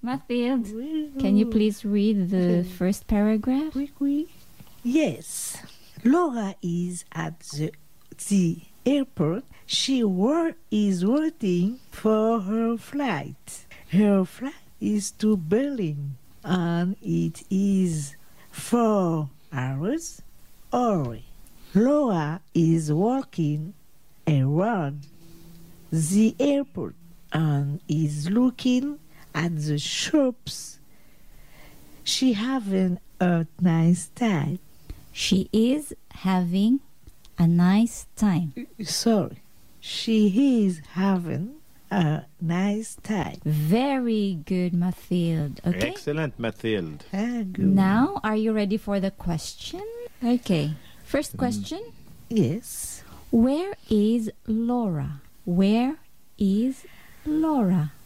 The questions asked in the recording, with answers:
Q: Where is Laura? Where is Laura?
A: Laura is at the airport.